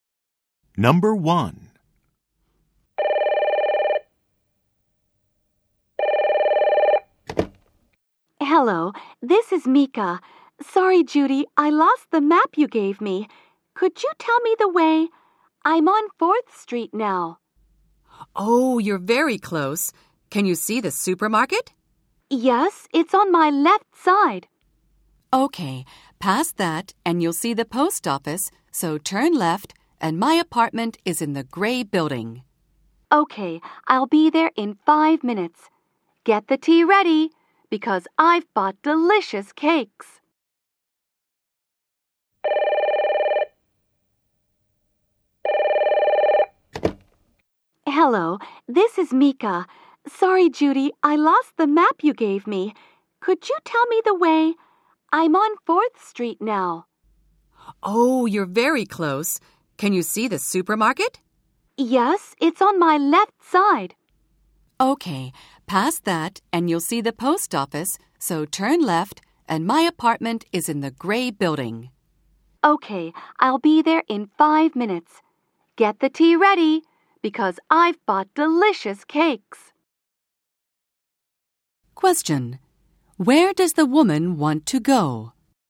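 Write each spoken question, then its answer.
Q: Question: Where does the woman want to go?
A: Judy's apartment in the gray building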